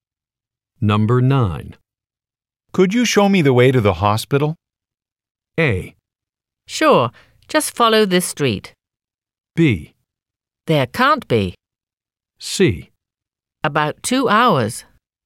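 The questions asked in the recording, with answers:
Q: Could you show me the way to the hospital?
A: A: Sure, just follow this street.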